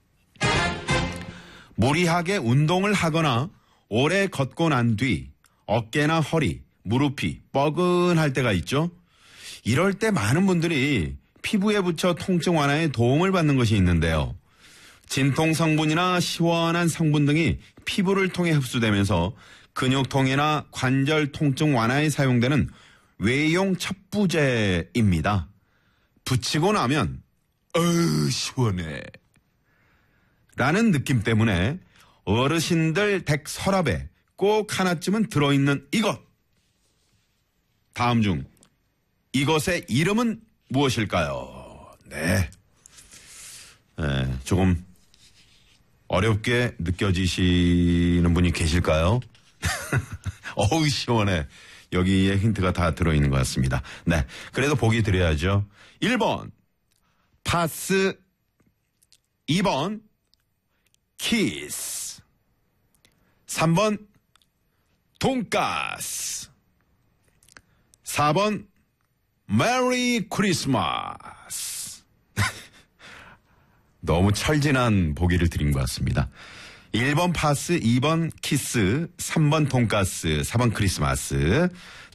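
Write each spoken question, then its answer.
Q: 다음 중 이것의 이름은 무엇일까요?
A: 1번: 파스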